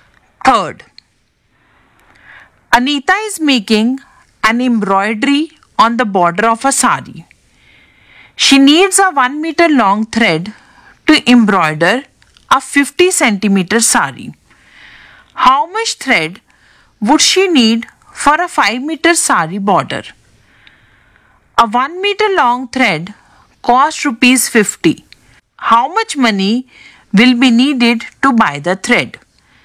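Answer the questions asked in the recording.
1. 10 meters
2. Rupees 500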